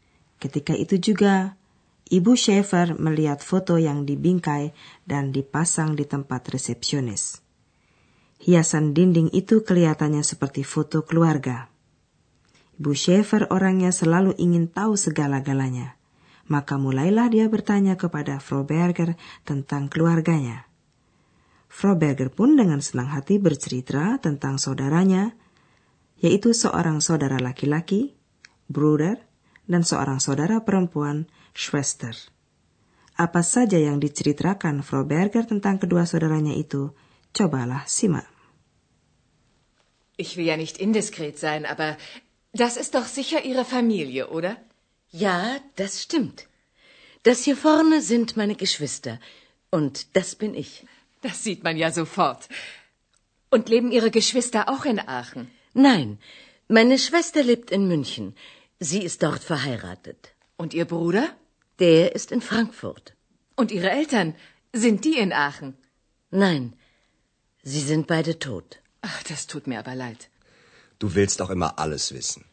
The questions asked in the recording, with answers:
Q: Apa saja yang diceritakan Frau Berger tentang kedua saudaranya itu, cobalah simak.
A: Nah, dapat Anda simpulkan tadi bahwa saudara perempuan Berger sudah berkeluarga dan tinggal di München, sedangkan saudara laki-lakinya tinggal di Frankfurt, bukan?